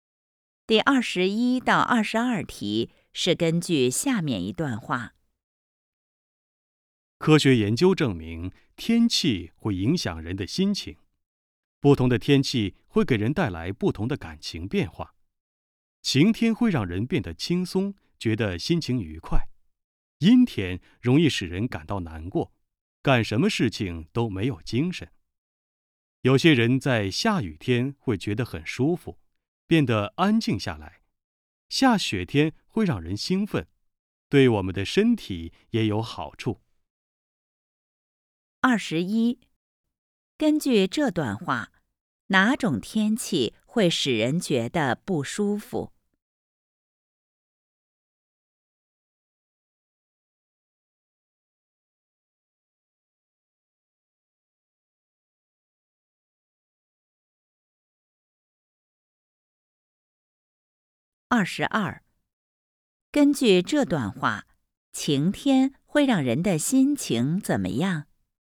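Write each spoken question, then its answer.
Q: 根据这段话,哪种天气会使人觉得不舒服?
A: 阴天

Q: 根据这段话,晴天会让人的心情怎么样?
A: 轻松愉快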